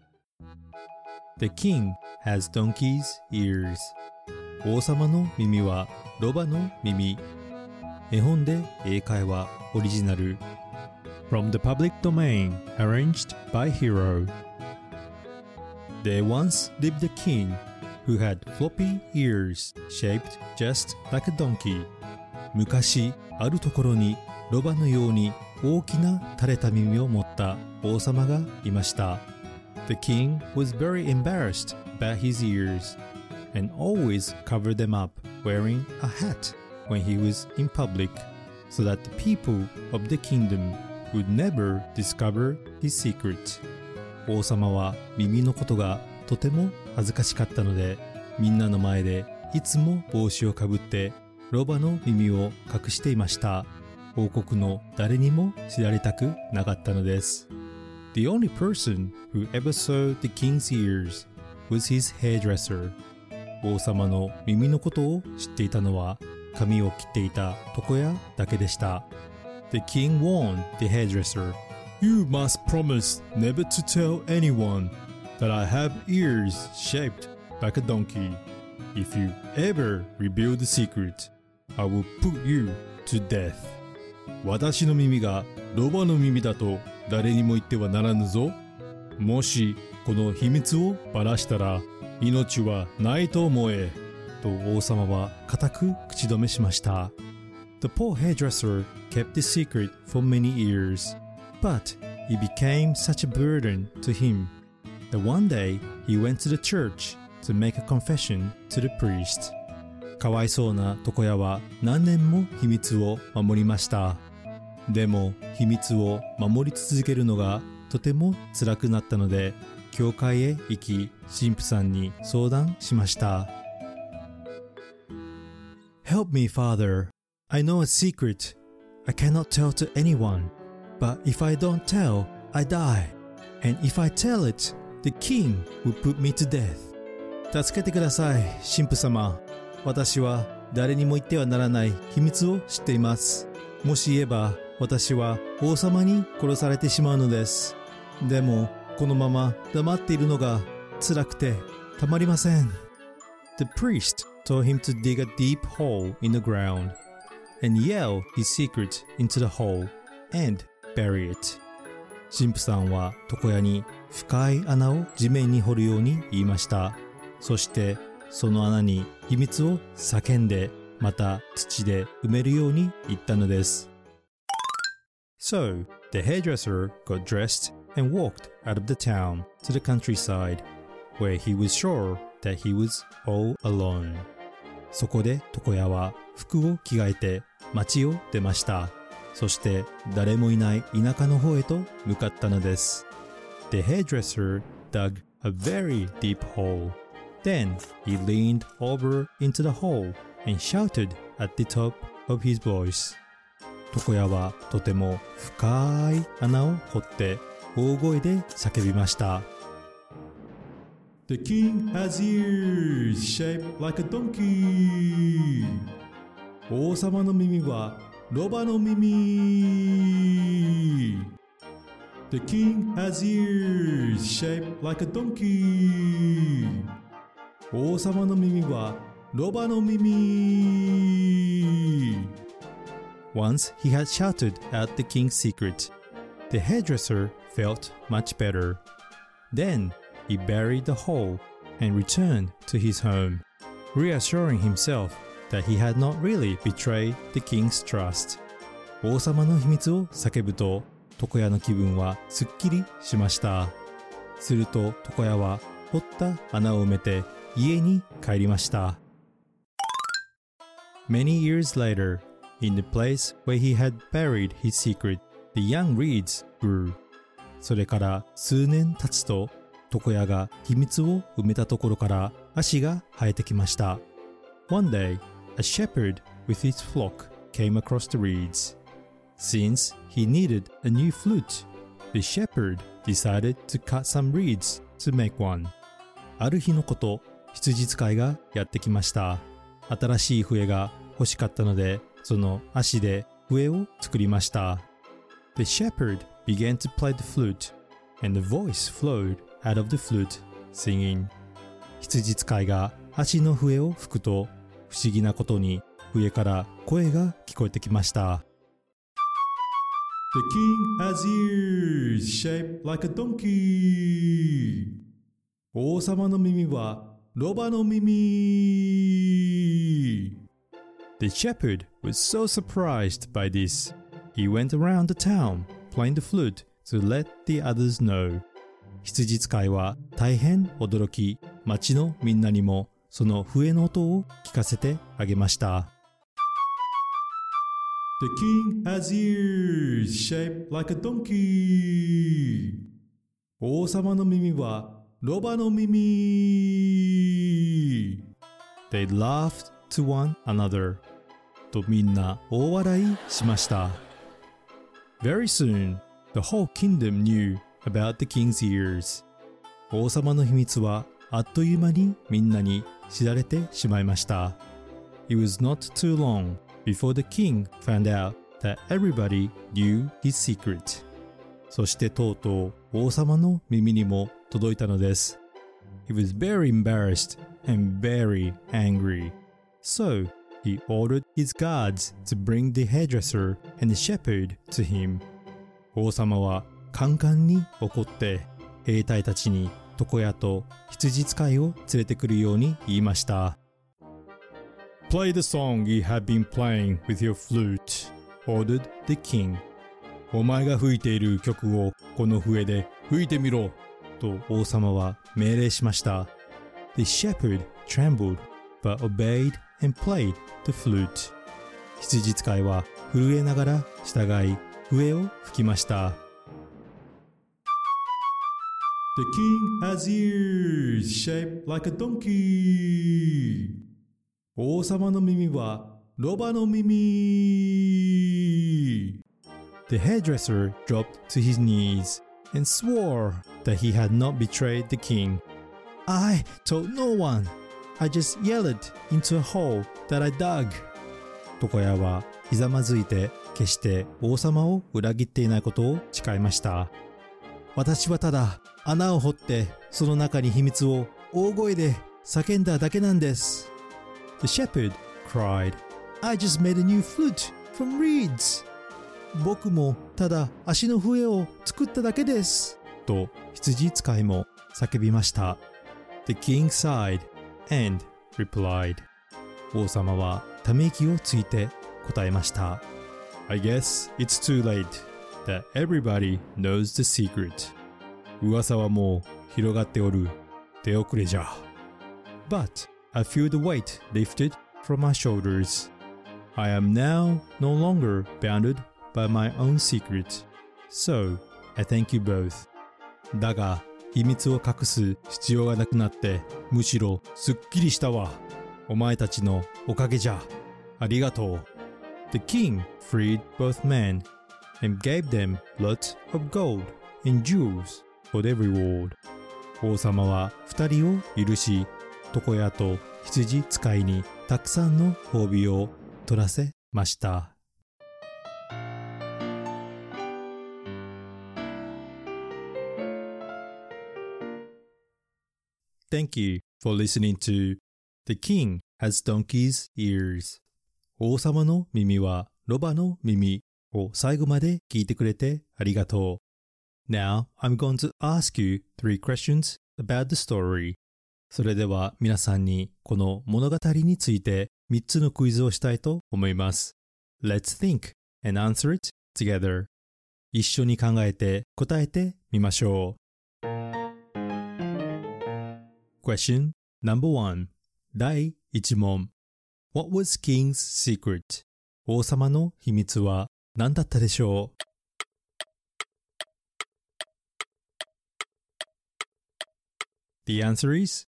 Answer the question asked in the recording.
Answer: He had floppy ears shaped just like a donkey